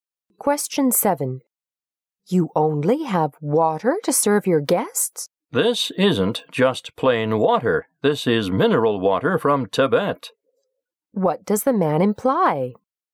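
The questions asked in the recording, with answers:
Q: What does the man imply?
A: The water is special: mineral water from Tibet.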